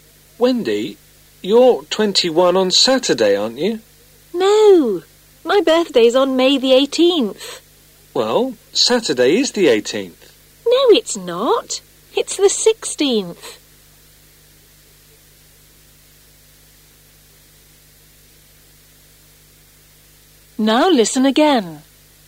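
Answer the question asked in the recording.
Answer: May the 18th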